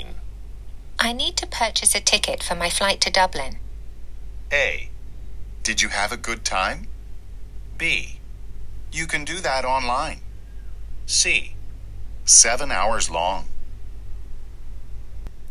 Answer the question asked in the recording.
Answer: 今日の正答は B になります